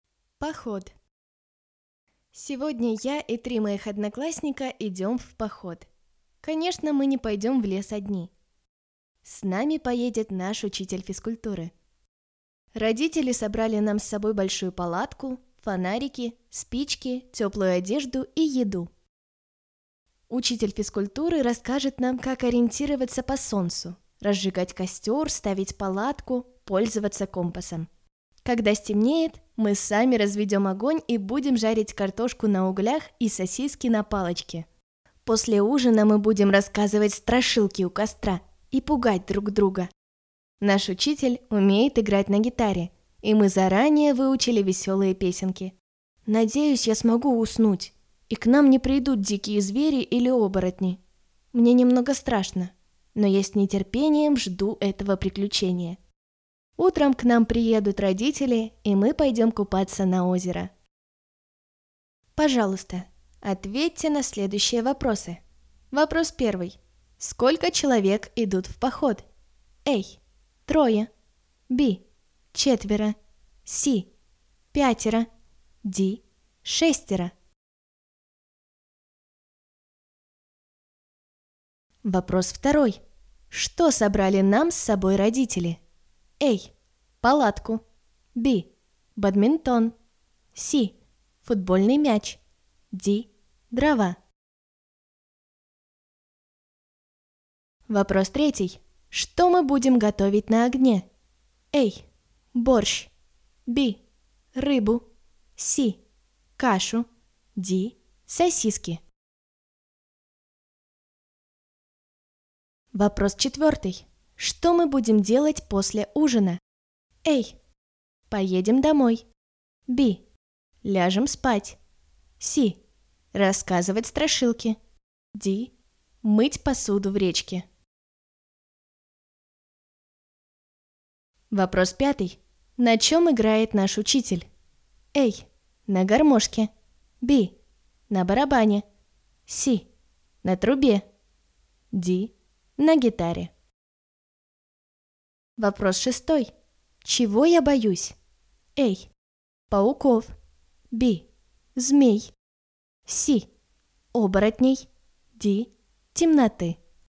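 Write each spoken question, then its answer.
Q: Что собрали нам с собой родители?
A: A: Палатку

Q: Что мы будем готовить на огне?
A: D: Сосиски

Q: Что мы будем делать после ужина?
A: C: Рассказывать страшилки

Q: На чем играет наш учитель?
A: D: На гитаре

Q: Чего я боюсь?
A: C: Оборотней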